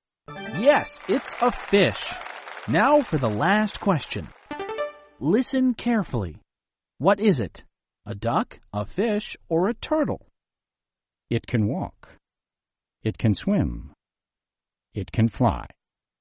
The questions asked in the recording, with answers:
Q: What is it?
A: It's a duck. A duck can swim, and a duck can walk, and a duck can fly.